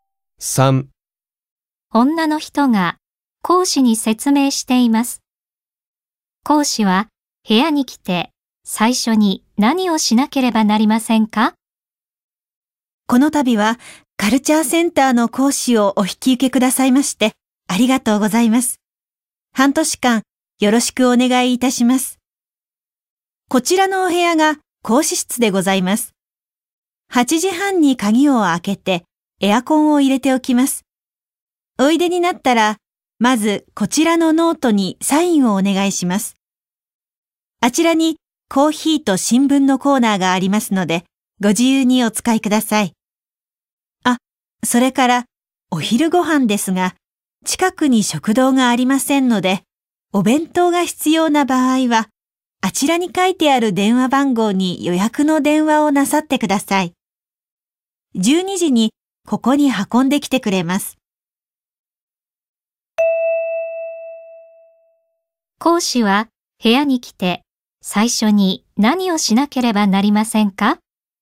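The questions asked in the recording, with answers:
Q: 講師は部屋に来て最初に何をしなければなりませんか?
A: ノートにサインをする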